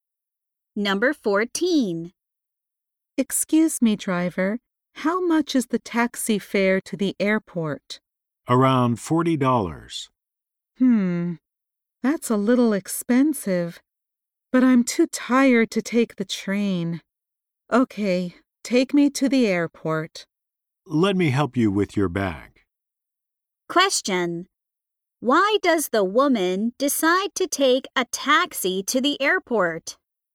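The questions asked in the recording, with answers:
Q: Why does the woman decide to take a taxi to the airport?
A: She is too tired to take the train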